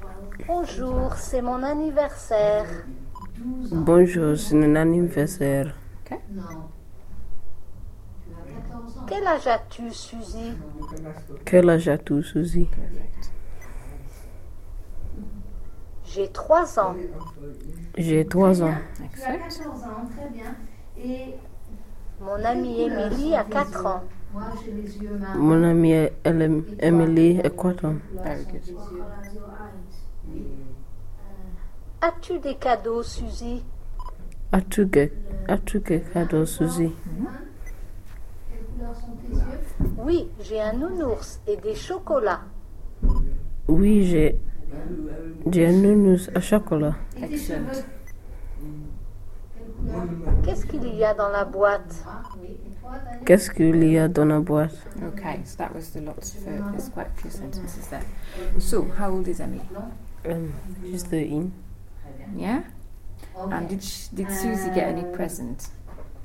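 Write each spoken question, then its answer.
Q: And did Suzy get any present?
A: Yes, a teddy bear and chocolates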